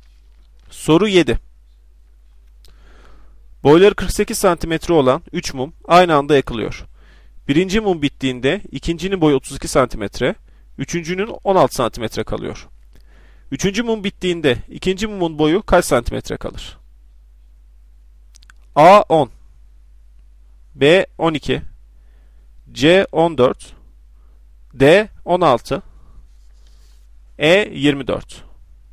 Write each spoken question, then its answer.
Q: Üçüncü mum bittiğinde ikinci mumun boyu kaç santimetre kalır?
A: Doğru cevap E 24.